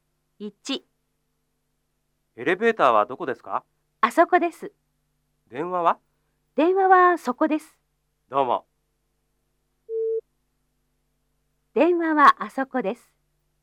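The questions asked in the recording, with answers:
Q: 電話はあそこです。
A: ×(電話はそこです)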